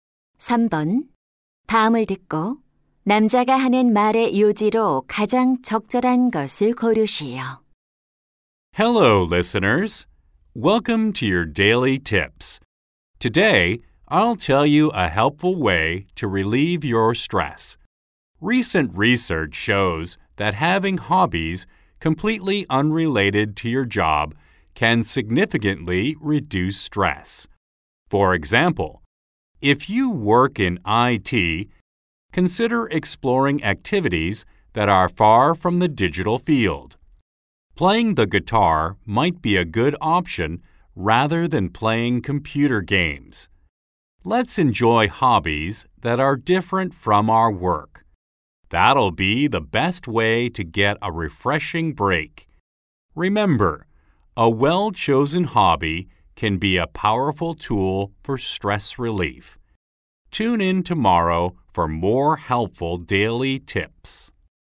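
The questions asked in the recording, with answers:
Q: 다음을 듣고 남자가 하는 말의 요지로 가장 적절한 것을 고르시오.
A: 업무와 무관한 취미는 스트레스 해소에 도움이 된다.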